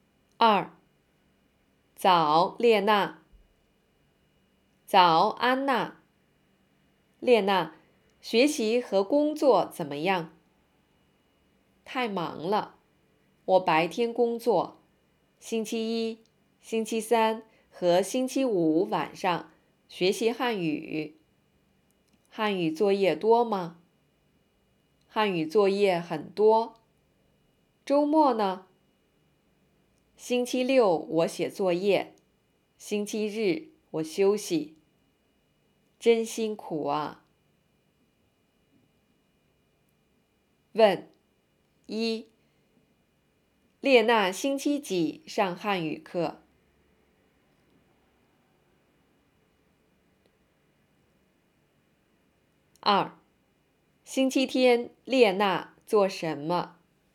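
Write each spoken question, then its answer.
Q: 列娜星期几上汉语课?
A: 星期一、星期三和星期五晚上

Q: 星期天列娜做什么?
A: 休息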